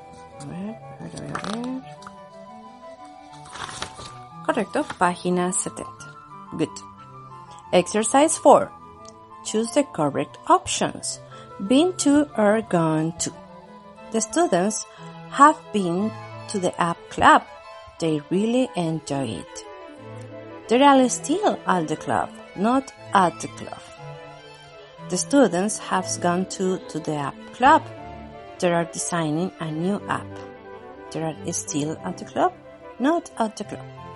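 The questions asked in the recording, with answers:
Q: The students have been to the app club. They really enjoy it. They are still at the club, not at the club.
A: not at the club

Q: The students have gone to the app club. They are designing a new app. They are still at the club, not at the club.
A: still at the club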